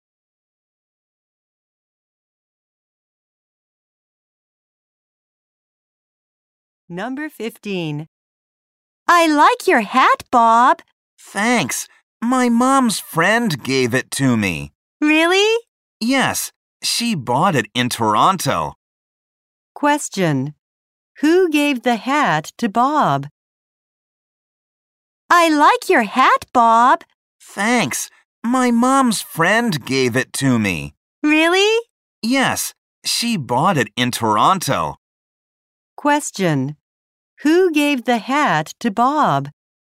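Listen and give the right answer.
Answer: His mom's friend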